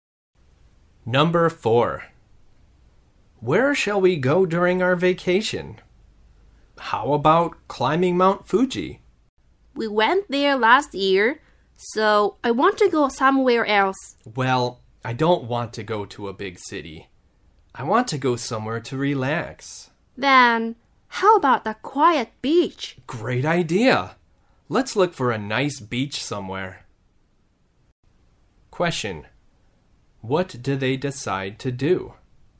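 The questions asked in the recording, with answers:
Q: what do they decide to do?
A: Go to a quiet beach to relax.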